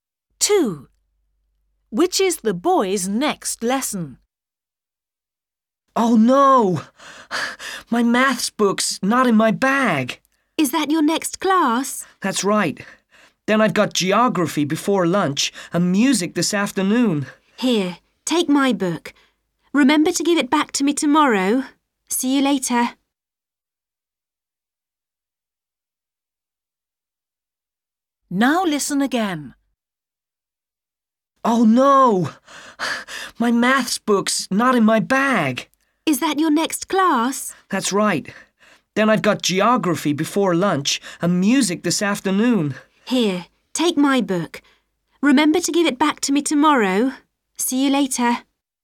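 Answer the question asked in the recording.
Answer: maths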